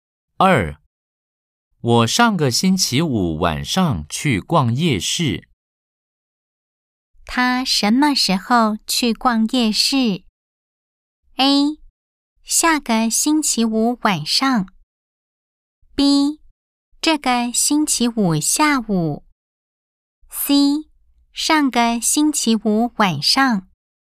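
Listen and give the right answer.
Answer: C: 上个星期五晚上。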